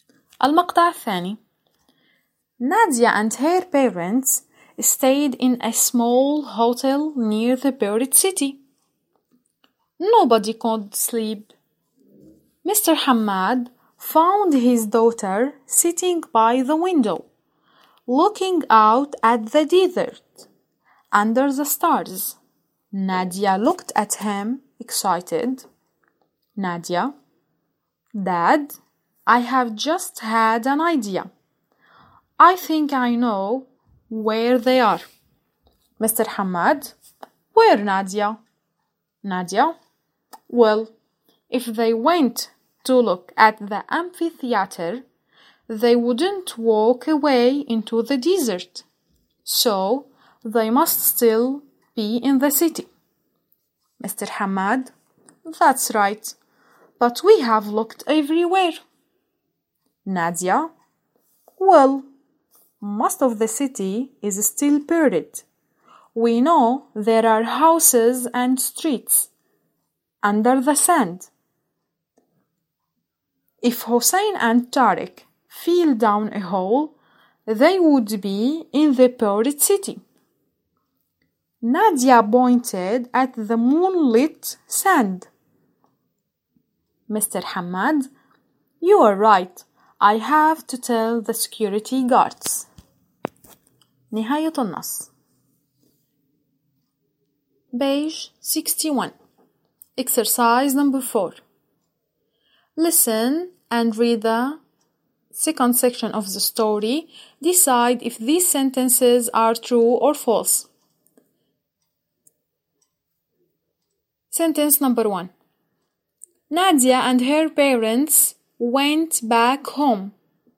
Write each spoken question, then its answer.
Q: Nadia and her parents went back home.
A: False. خطأ.